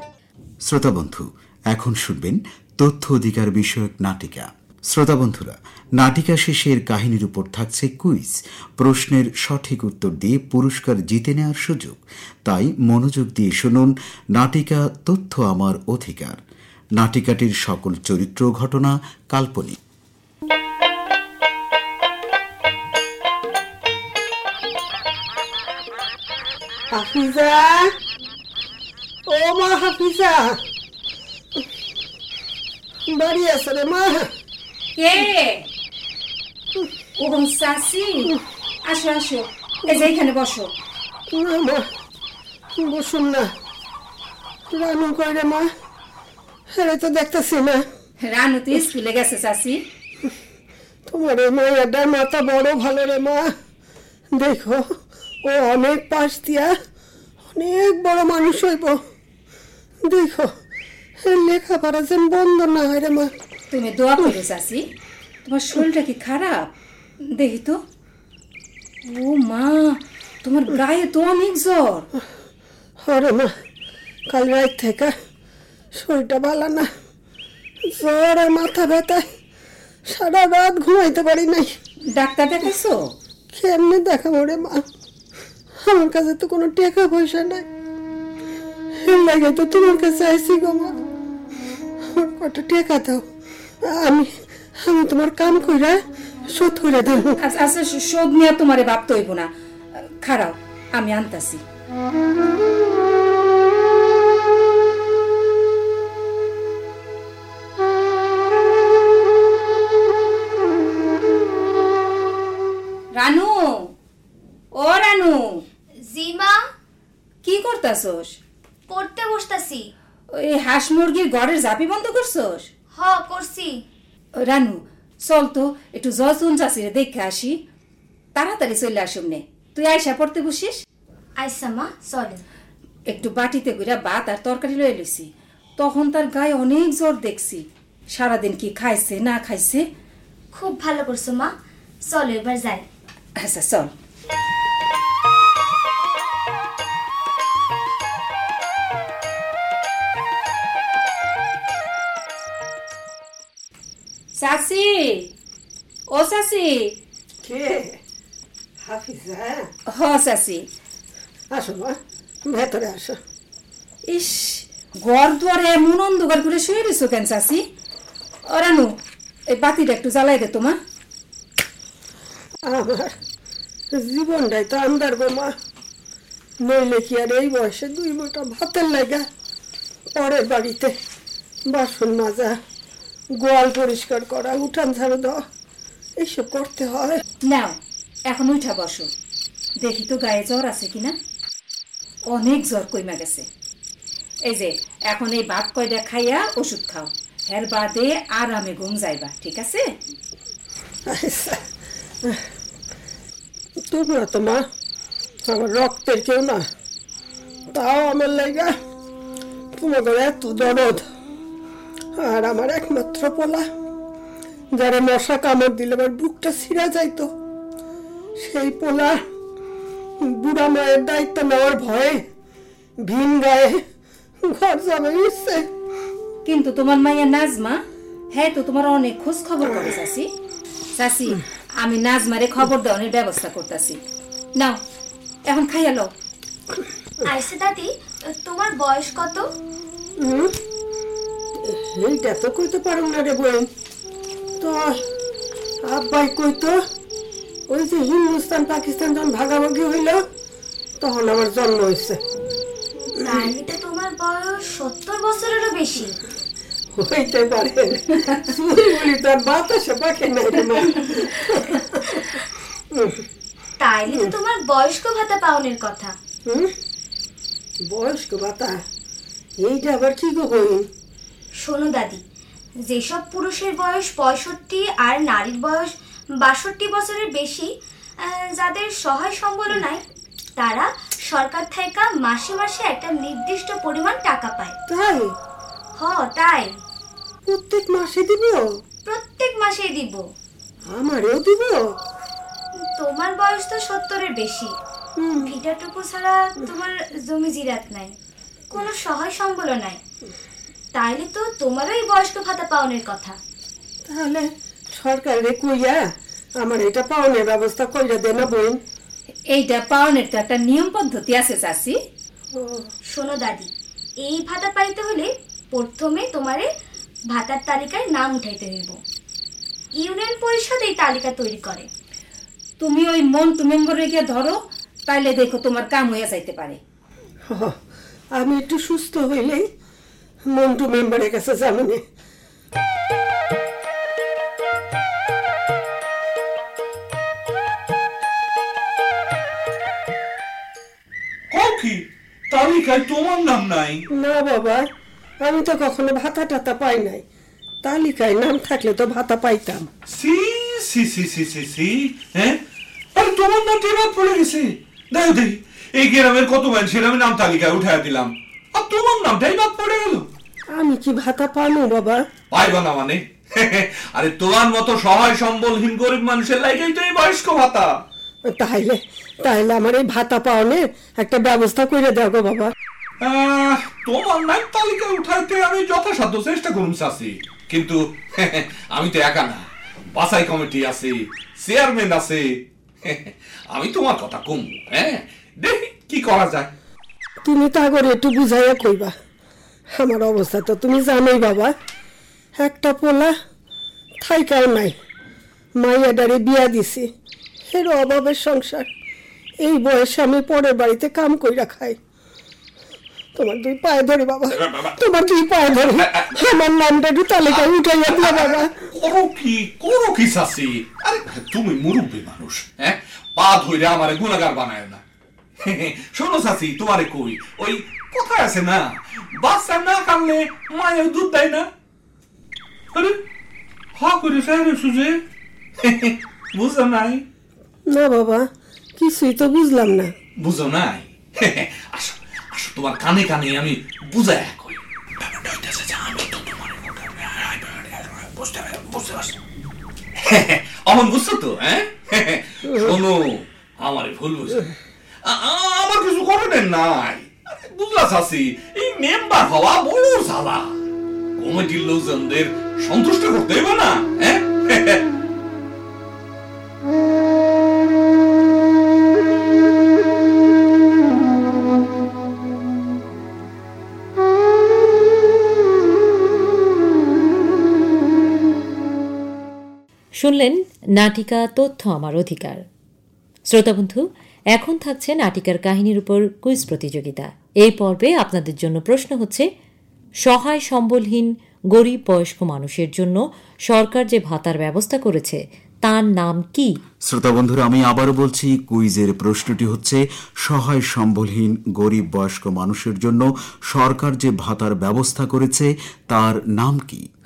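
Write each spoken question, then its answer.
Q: সহায় সম্বলহীন গরিব বয়স্ক মানুষের জন্য সরকার যে ভাতার ব্যবস্থা করেছে তার নাম কি?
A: বয়স্ক ভাতা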